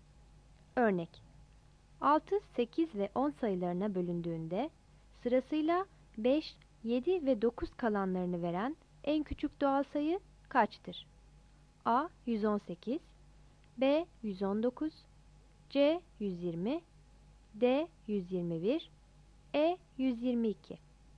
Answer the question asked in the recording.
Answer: X artı 1 eşittir 120, x eşittir 119.